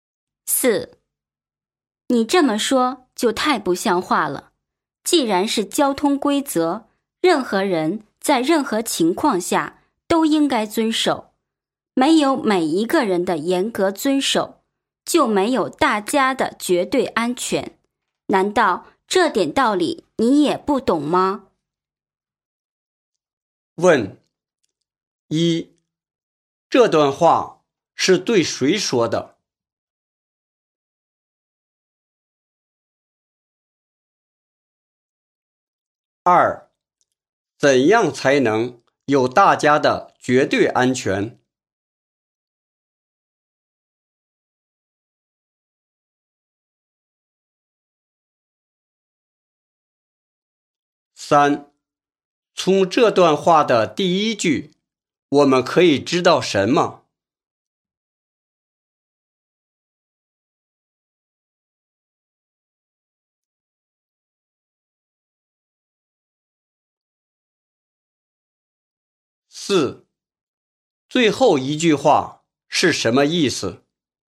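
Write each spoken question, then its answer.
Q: 怎样才能有大家的绝对安全?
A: 每一个人都严格遵守交通规则

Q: 最后一句话是什么意思?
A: 这点道理你应该懂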